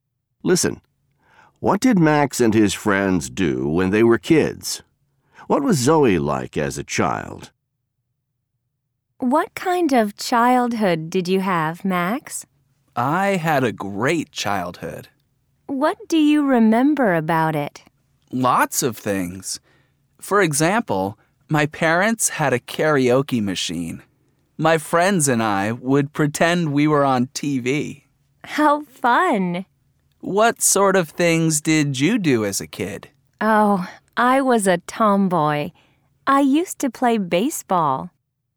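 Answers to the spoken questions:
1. They pretended they were on TV, using his parents' karaoke machine.
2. She was a tomboy who played baseball.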